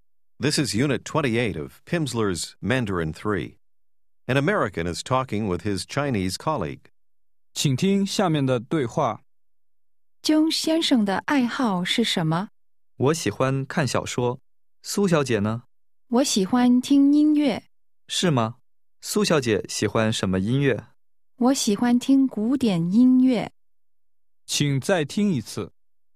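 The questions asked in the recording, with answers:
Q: 姜先生的爱好是什么?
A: 看小说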